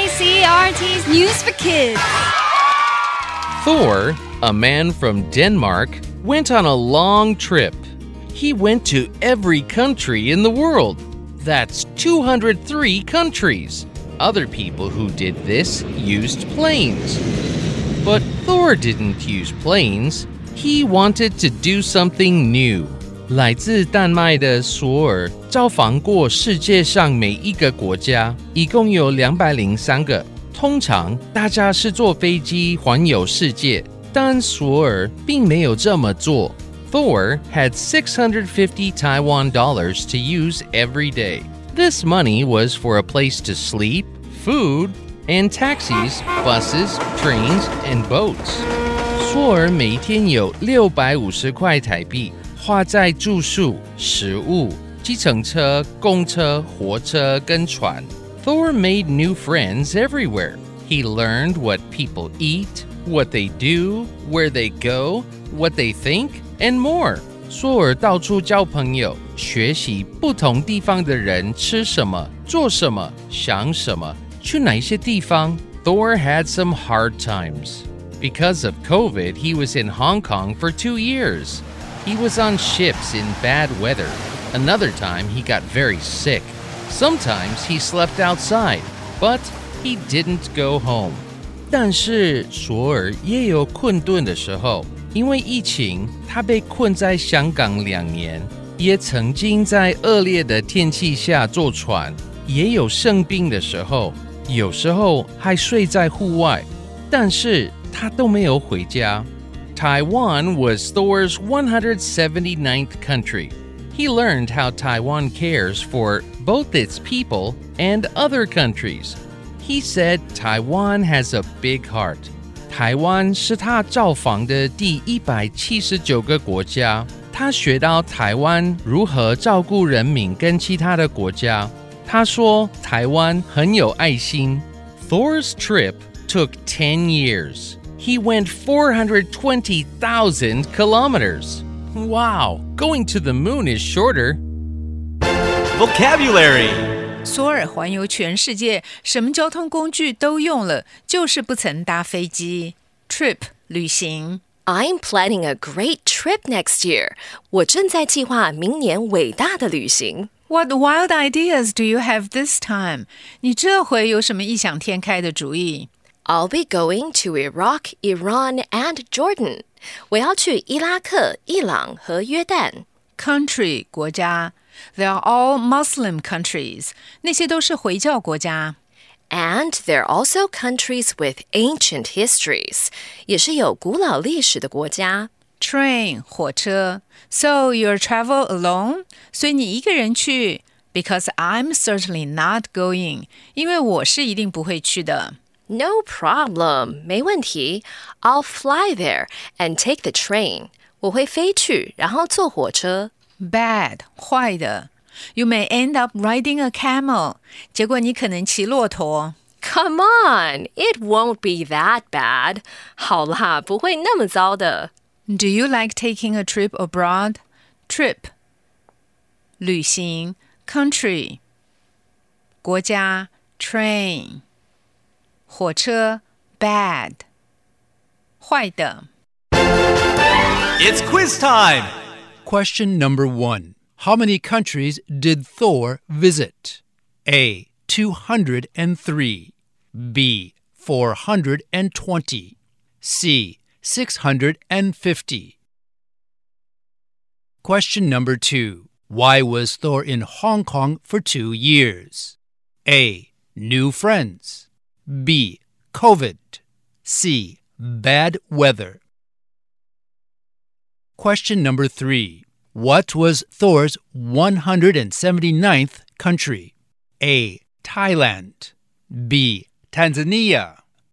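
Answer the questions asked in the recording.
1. A: 203
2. B: COVID
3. C: Taiwan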